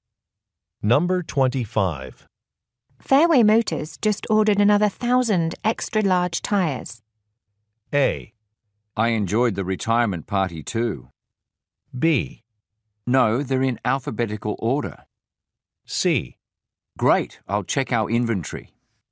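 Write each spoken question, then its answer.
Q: Fairway Motors just ordered another 1,000 extra large tires.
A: C: Great, I'll check our inventory.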